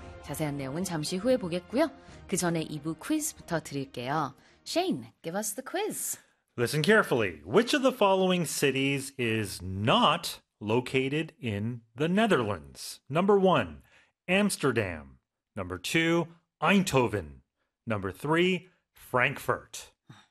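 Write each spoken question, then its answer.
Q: Which of the following cities is not located in the Netherlands?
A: 3: Frankfurt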